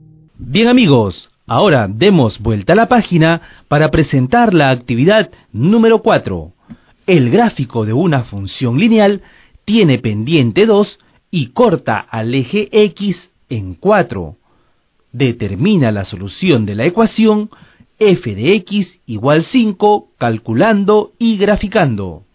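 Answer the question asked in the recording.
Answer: x = 6,5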